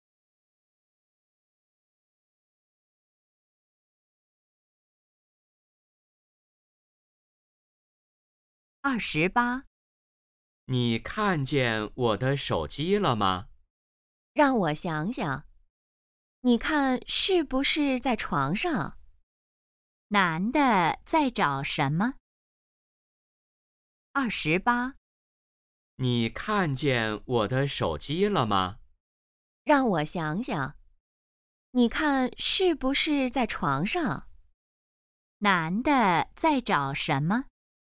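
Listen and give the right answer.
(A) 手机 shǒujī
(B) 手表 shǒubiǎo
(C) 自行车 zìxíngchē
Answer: (A) 手机 shǒujī

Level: HSK2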